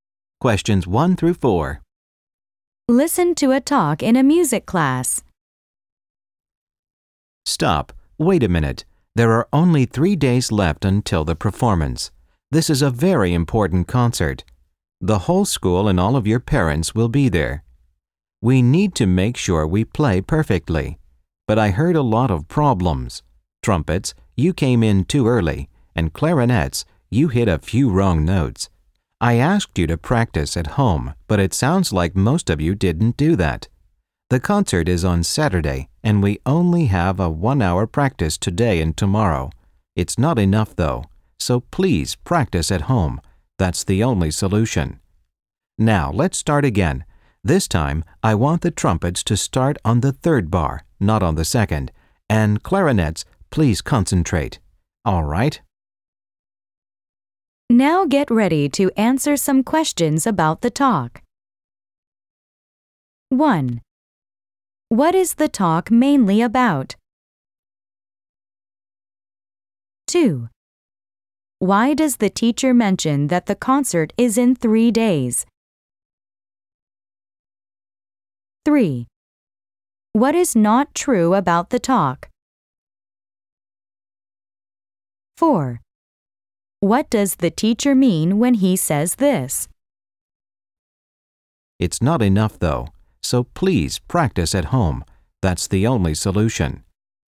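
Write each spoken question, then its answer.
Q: What is the talk mainly about?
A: Problems in the rehearsal and the need to practice more before the concert

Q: Why does the teacher mention that the concert is in 3 days?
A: To stress that there is little time left to practice

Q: What does the teacher mean when he says this?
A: The class practice time is not enough, so students must practice at home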